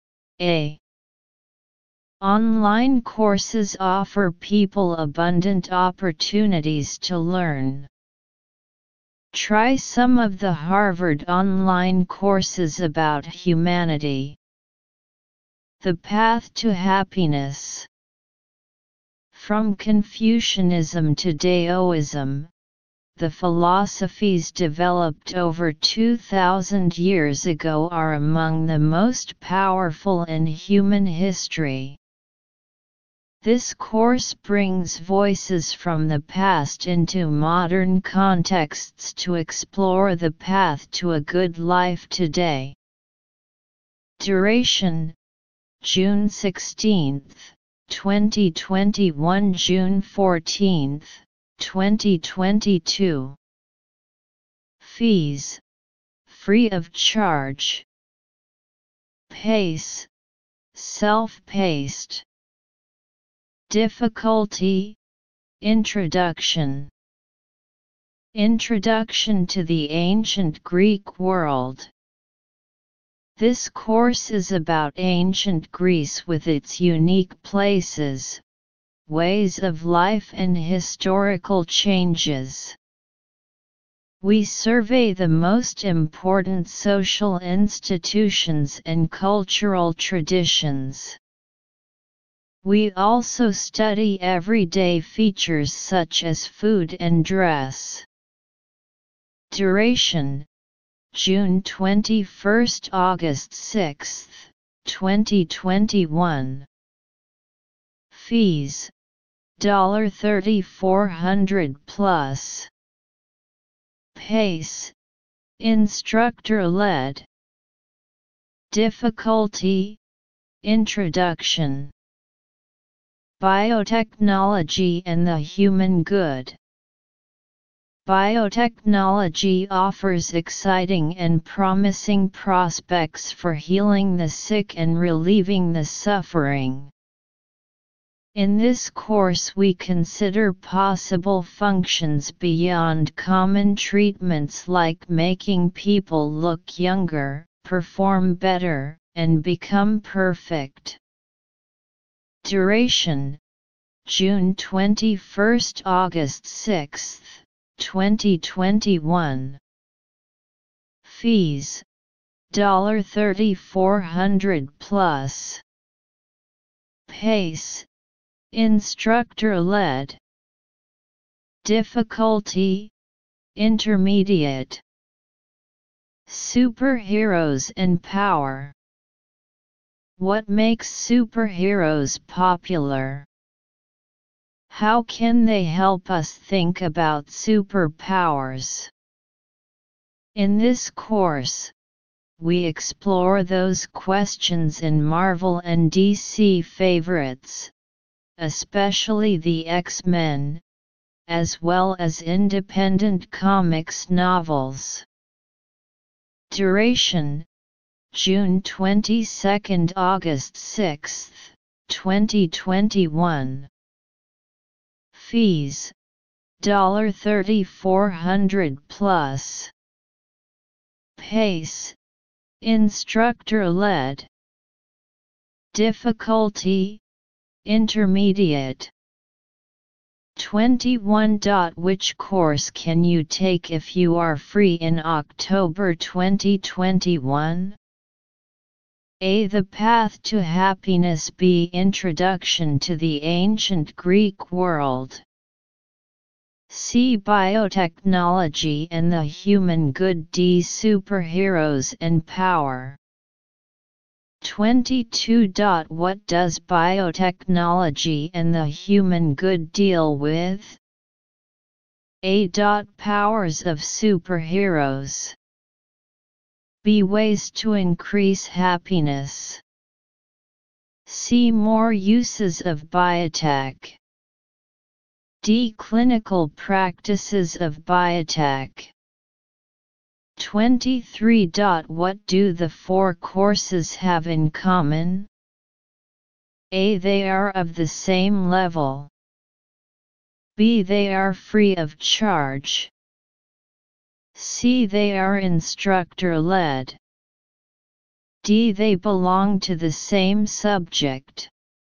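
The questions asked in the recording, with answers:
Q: Which course can you take if you are free in October 2021?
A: A: The Path to Happiness

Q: What do the four courses have in common?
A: D: They belong to the same subject.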